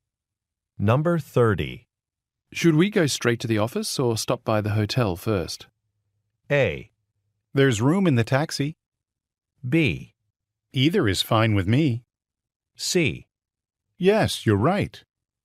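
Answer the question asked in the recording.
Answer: B: Either is fine with me.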